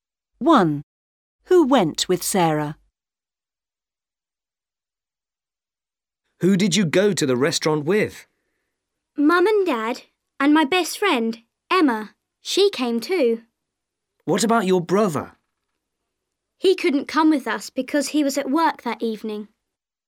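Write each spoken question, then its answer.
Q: Who went with Sarah?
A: Mum, Dad and her best friend Emma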